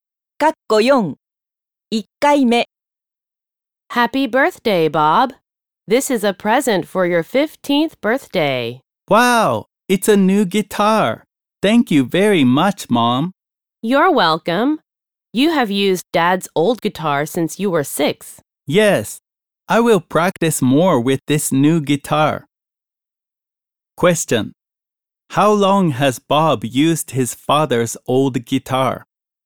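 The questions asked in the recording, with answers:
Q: How long has Bob used his father's old guitar?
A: Since he was 6 (for about 9 years).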